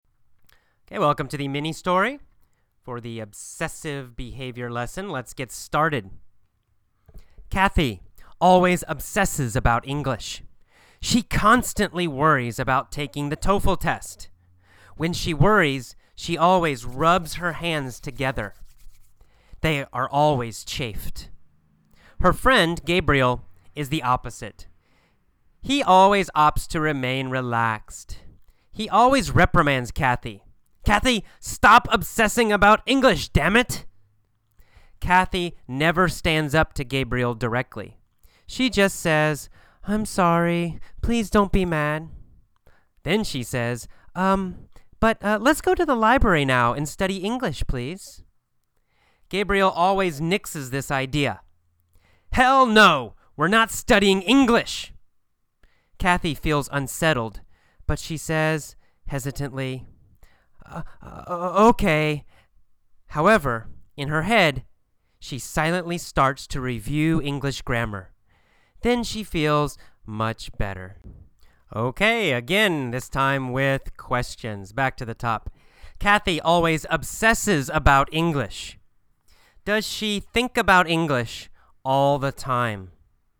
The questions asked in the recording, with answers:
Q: Does she think about English all the time?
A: Yes, that's right. She always thinks about English.